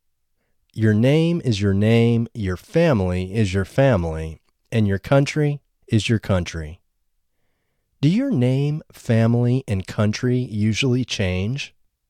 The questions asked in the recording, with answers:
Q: Do your name, family, and country usually change?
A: No, your name, family, and country don't usually change.